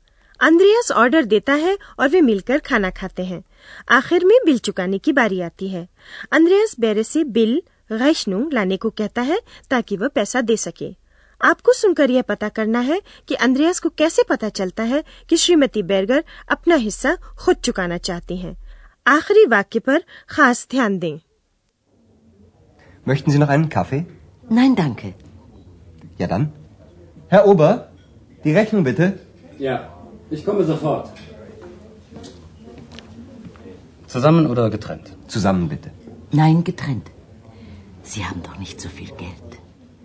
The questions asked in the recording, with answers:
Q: आपको सुनकर यह पता करना है कि Andreas को कैसे पता चलता है कि श्रीमती बैरगर अपना हिस्सा खुद चुकाना चाहती हैं।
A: तब श्रीमती बैरगर कहती है कि वे अपना हिस्सा स्वयं चुकाएंगी नहीं अलग अलग